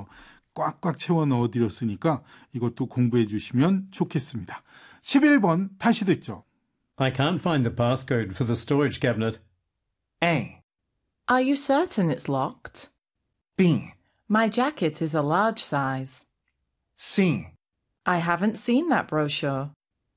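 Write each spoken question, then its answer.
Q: I can't find the passcode for the storage cabinet.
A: A: Are you certain it's locked?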